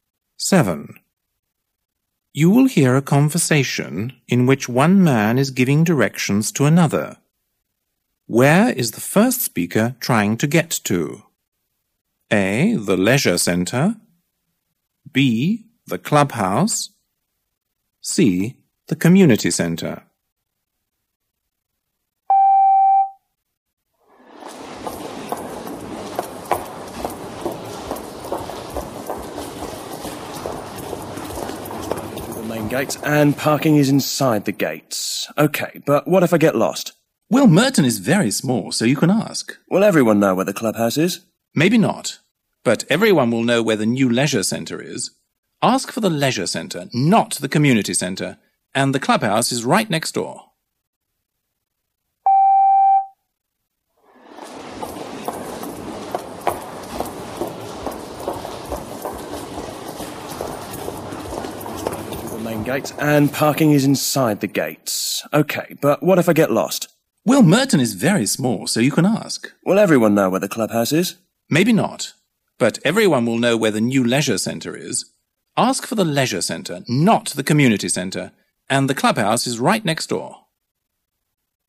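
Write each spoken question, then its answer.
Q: Where is the first speaker trying to get to?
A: B: The clubhouse.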